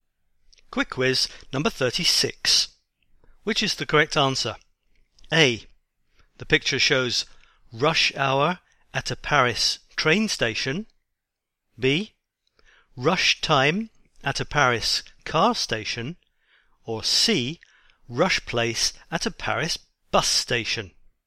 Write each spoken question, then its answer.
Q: Which is the correct answer?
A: And the answer is A. In the picture, we see rush hour at a Paris train station.